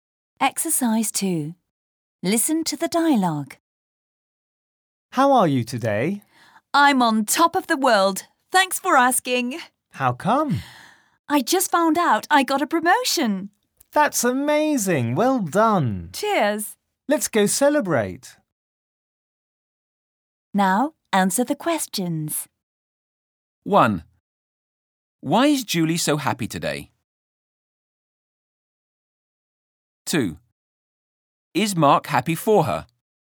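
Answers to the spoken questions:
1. She just found out she got a promotion.
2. Yes, he says it's amazing and wants to go celebrate.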